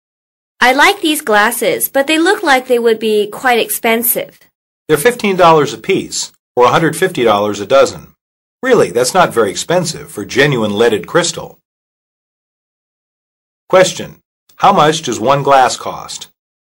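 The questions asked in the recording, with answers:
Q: How much does one glass cost?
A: $15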